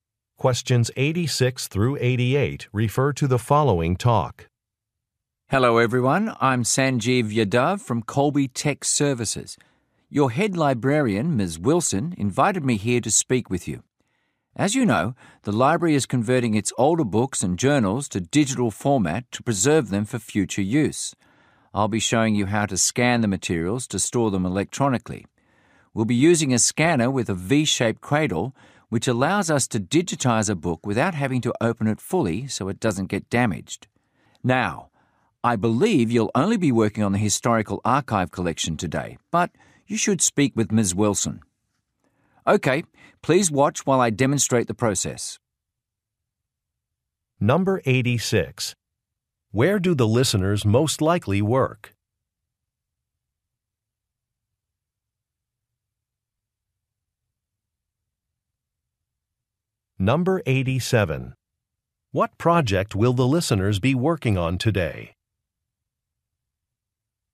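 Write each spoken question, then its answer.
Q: Where do the listeners most likely work?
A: At a library

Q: What project will the listeners be working on today?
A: Scanning the historical archive collection into digital format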